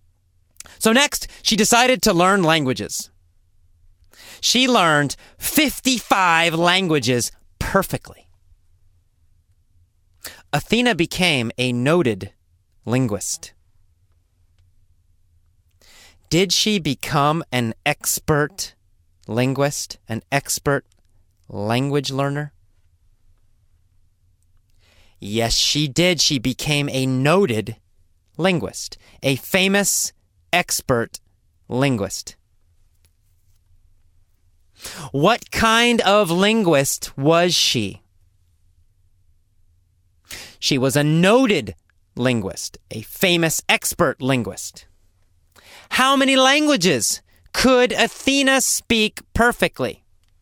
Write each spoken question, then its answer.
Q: How many languages could Athena speak perfectly?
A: 55. Athena could speak 55 languages perfectly.